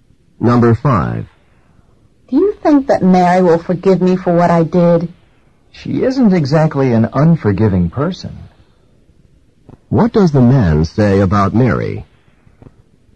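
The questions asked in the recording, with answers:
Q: What does the man say about Mary?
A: She is a forgiving person, so she will probably forgive you.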